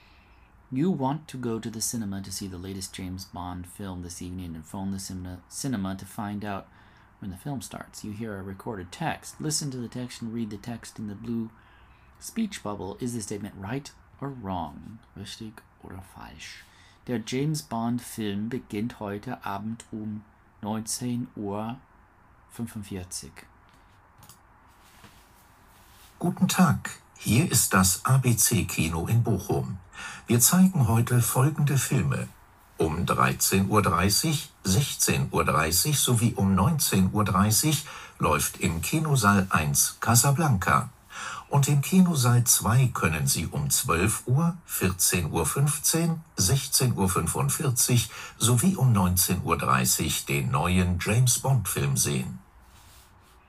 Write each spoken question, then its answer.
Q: Richtig oder falsch? Der James Bond Film beginnt heute Abend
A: Falsch, 19.30 Uhr.